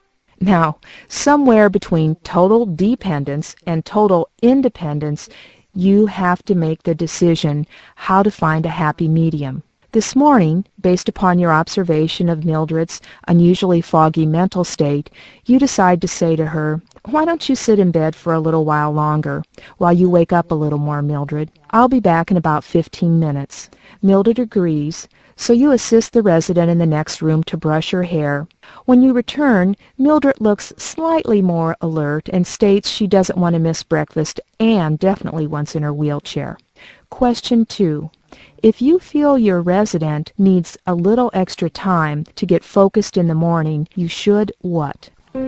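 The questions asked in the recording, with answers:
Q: If you feel your resident needs a little extra time to get focused in the morning, you should what?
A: Let them sit in bed a little longer and come back later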